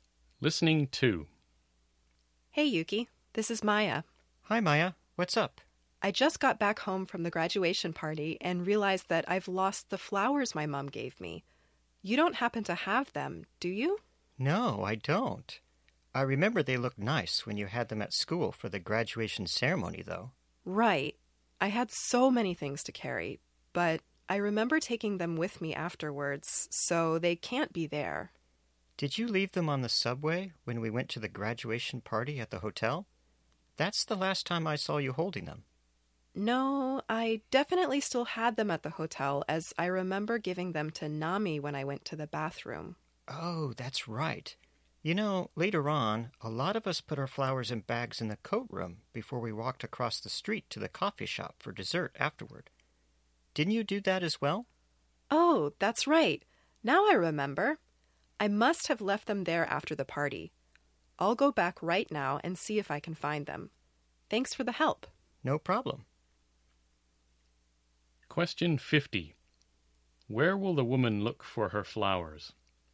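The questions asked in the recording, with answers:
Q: Where will the woman look for her flowers?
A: In the coat room at the hotel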